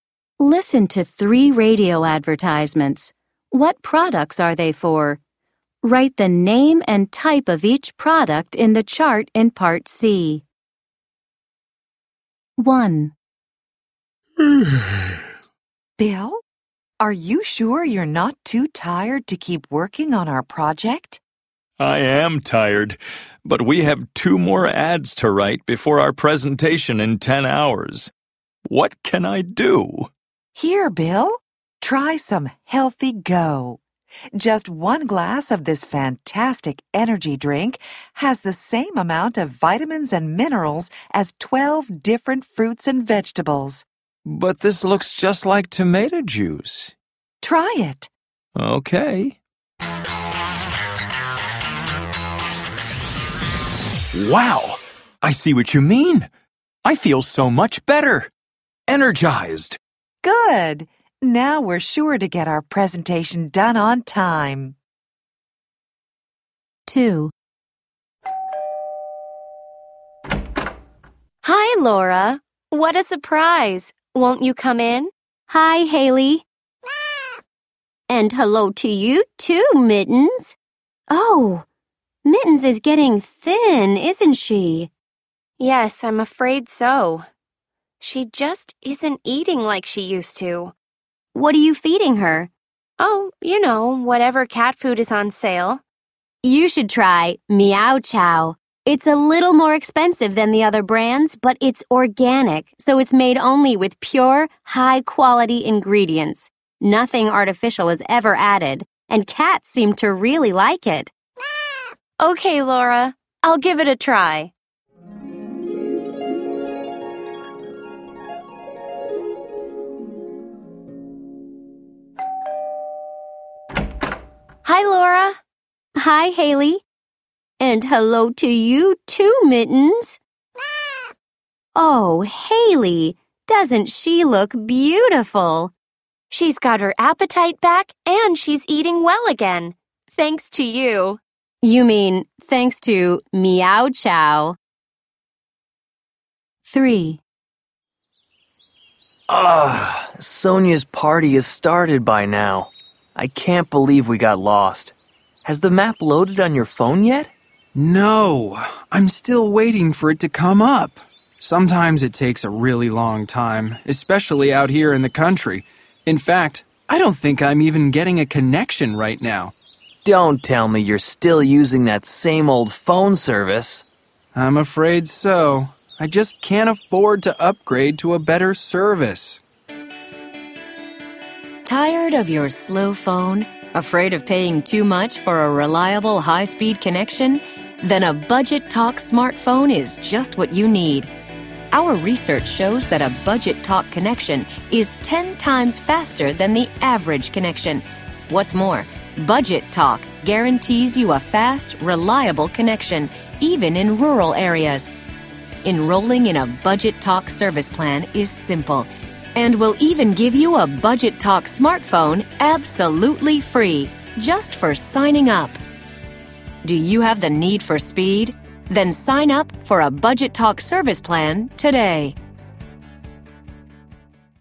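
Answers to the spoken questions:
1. Healthy Go, an energy drink
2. Meow Chow, organic cat food
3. Budget Talk, a phone service plan / smartphone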